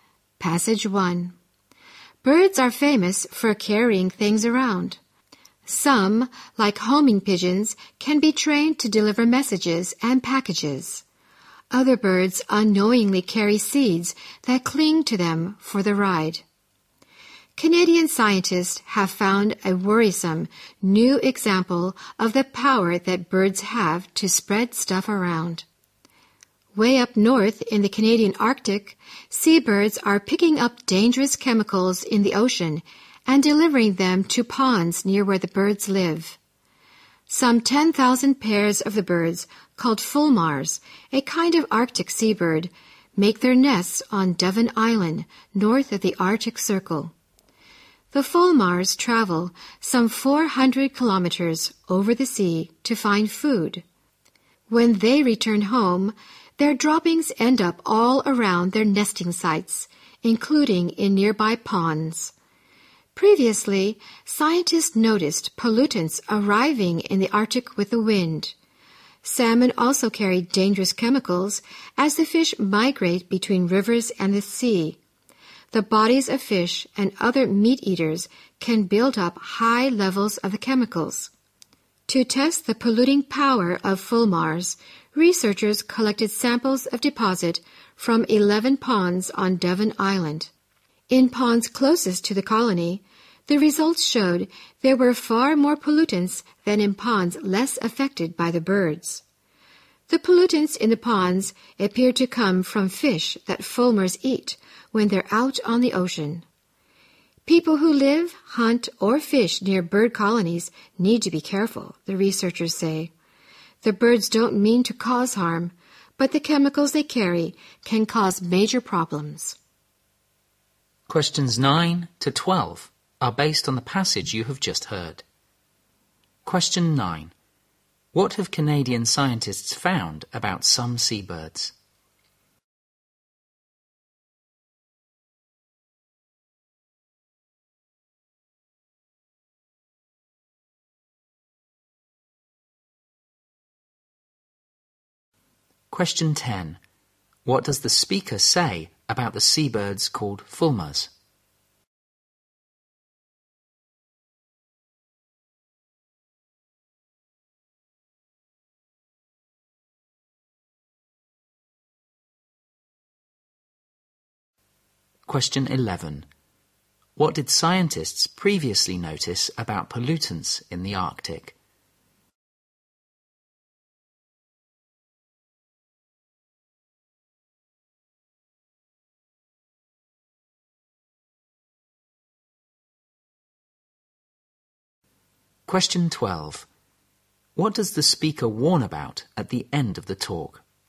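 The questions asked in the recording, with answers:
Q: What have Canadian scientists found about some seabirds?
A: They carry dangerous chemicals from the ocean to ponds near their homes.

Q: What did scientists previously notice about pollutants in the Arctic?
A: They arrived with the wind.

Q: What does the speaker warn about at the end of the talk?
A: People living, hunting or fishing near bird colonies need to be careful.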